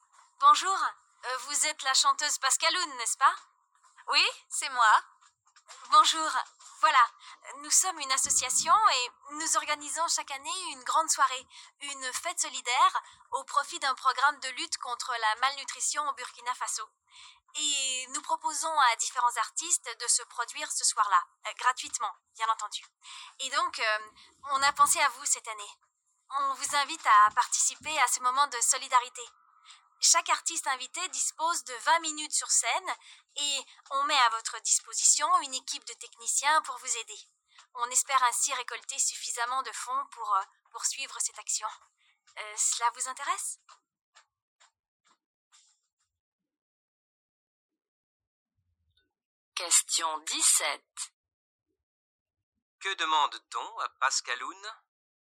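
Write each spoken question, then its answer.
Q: Que demande-t-on à Pascaloun ?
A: De chanter gratuitement lors d'une soirée solidaire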